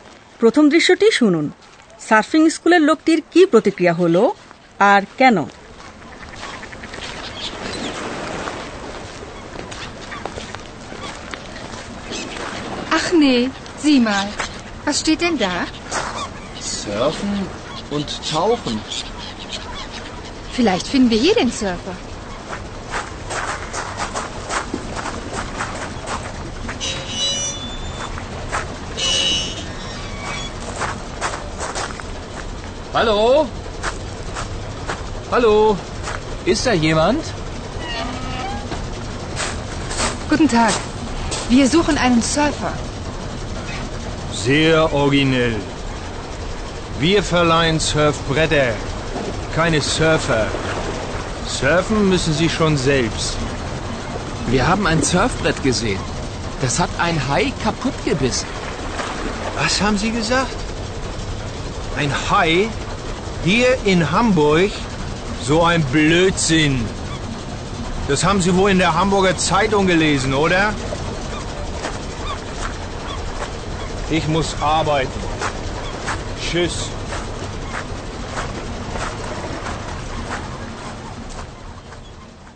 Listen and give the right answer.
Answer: লোকটা কেমন যেন বদমেজাজি তাই না হয় তিনি কিছু লুকোতে চান নয়তো এদের দুজনকে এড়াতে চান